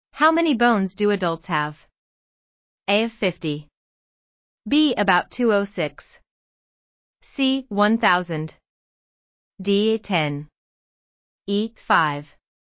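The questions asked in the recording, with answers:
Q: How many bones do adults have?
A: B: About 206.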